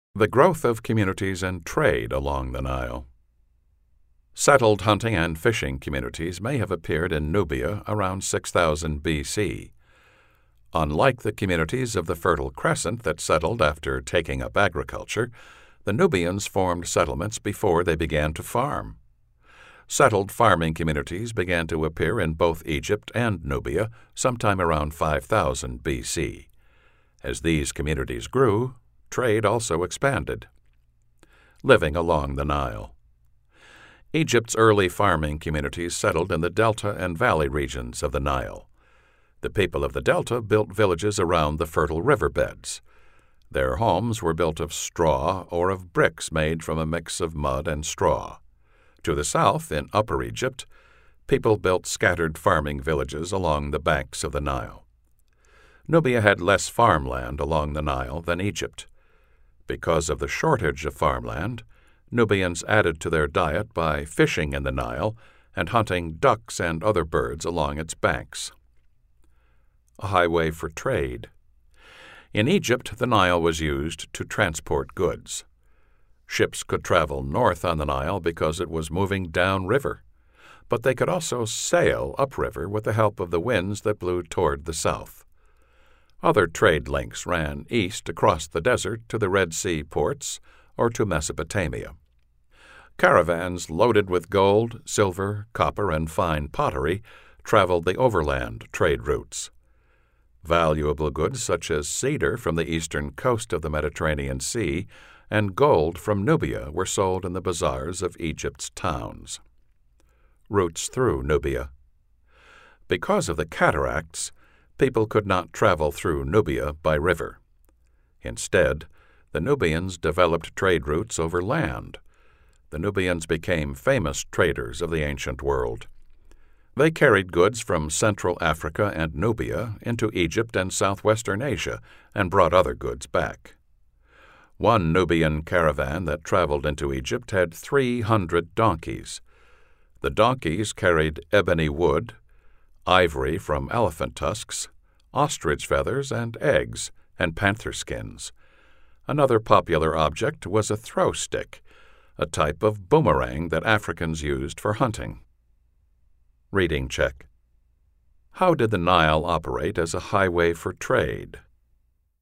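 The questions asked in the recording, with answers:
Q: How did the Nile operate as a highway for trade?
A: It was used to transport goods: ships sailed north with the river's downstream current and south (upriver) with winds blowing toward the south.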